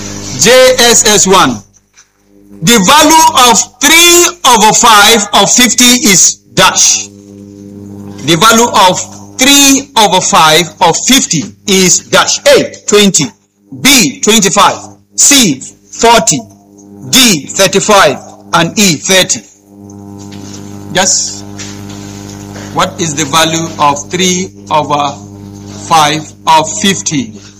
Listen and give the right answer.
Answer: 30, which is letter